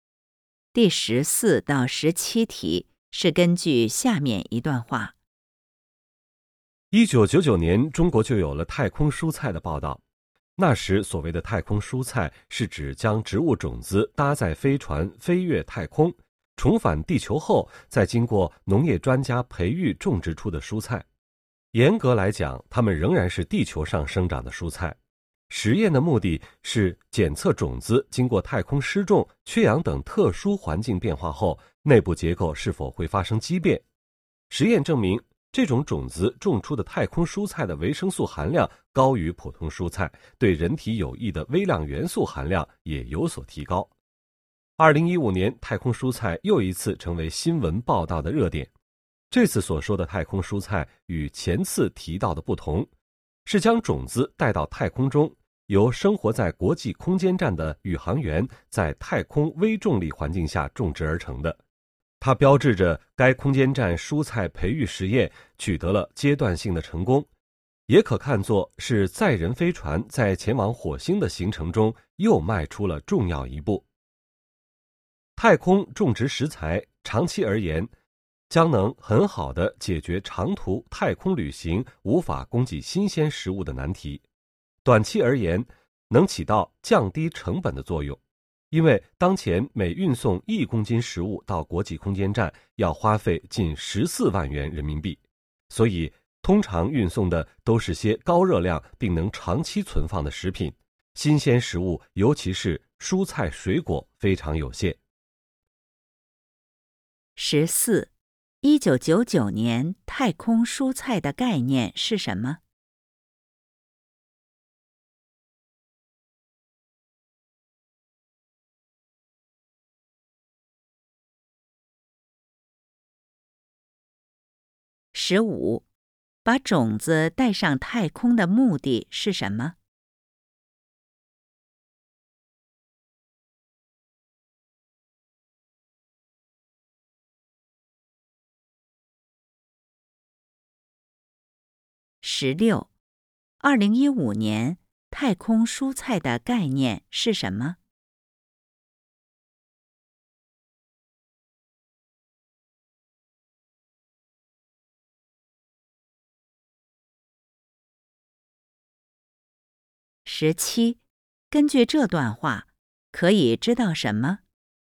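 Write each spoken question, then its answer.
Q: 1999年太空蔬菜的概念是什么?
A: 种子搭载飞船飞越太空,返回地球后培育种植出的蔬菜

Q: 把种子带上太空的目的是什么?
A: 检测种子经过太空特殊环境后内部结构是否会发生畸变

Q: 2015年太空蔬菜的概念是什么?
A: 宇航员在国际空间站太空微重力环境下种植出的蔬菜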